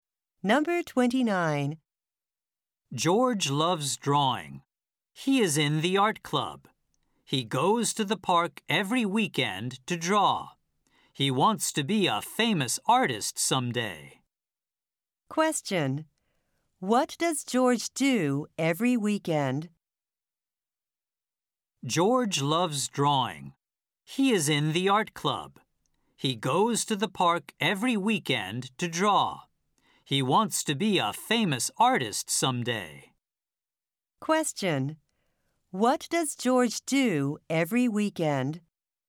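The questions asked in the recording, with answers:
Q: What does George do every weekend?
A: He goes to the park to draw.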